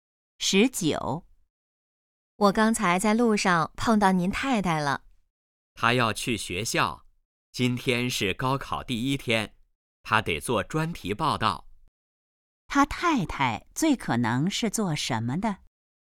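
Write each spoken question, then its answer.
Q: 他太太最可能是做什么的?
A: 记者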